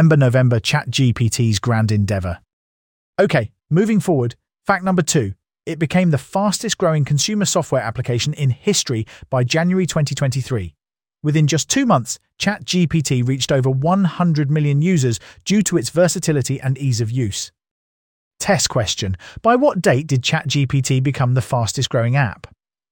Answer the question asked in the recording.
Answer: January 2023.